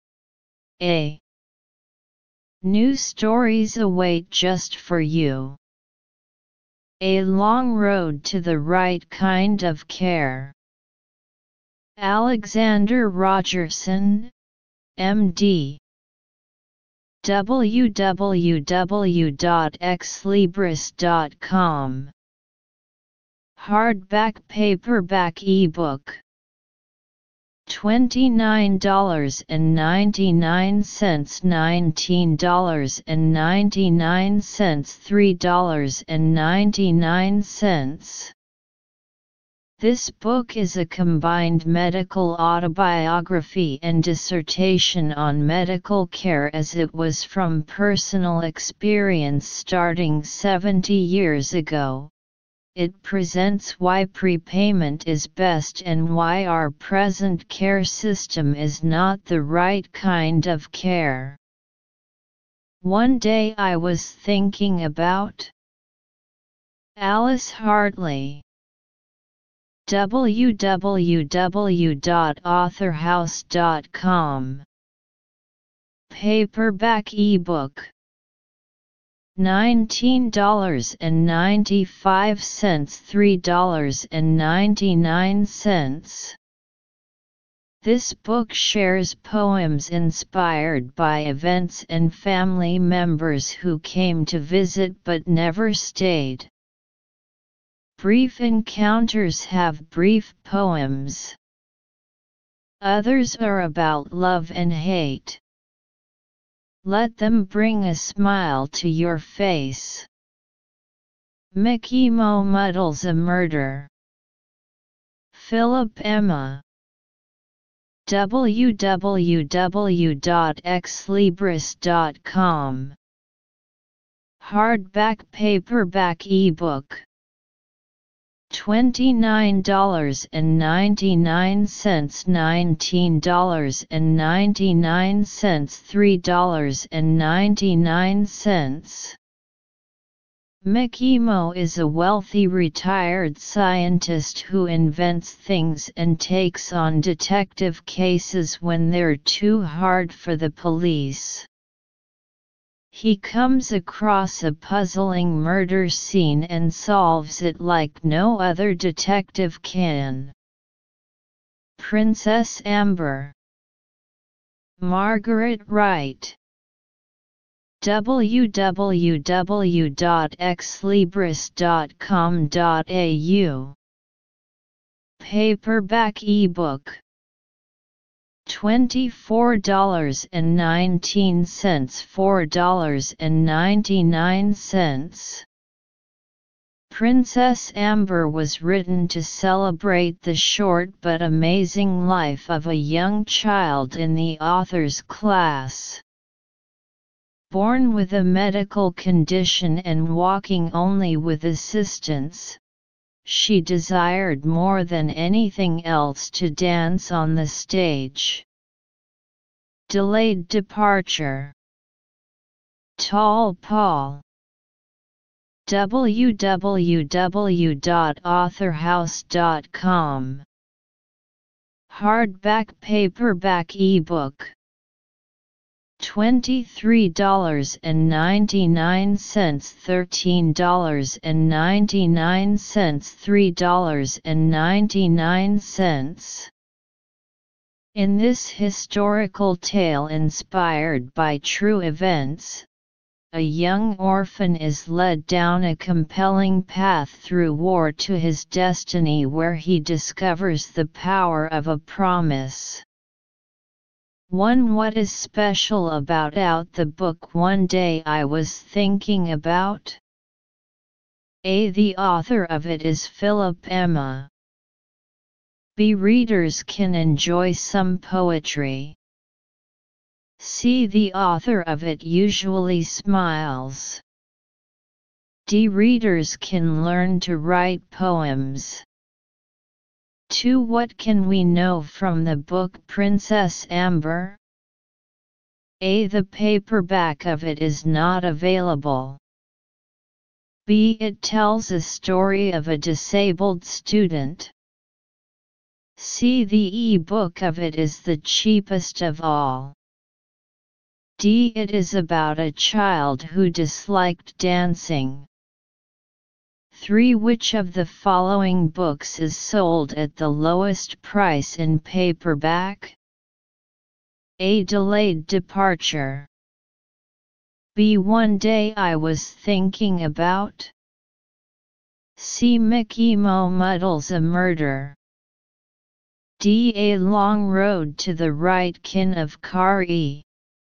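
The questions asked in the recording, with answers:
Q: One, what is special about out the book one day I was thinking about?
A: B: Readers can enjoy some poetry.

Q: What can we know from the book Princess Amber?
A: B: It tells a story of a disabled student.

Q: Which of the following books is sold at the lowest price in paperback?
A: A: Delayed Departure.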